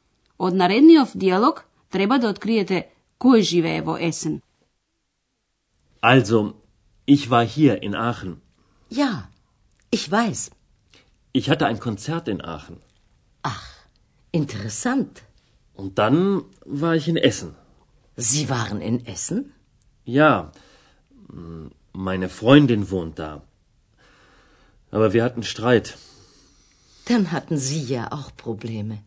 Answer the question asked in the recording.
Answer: Значи во Есен живее пријателката на господин Мајер.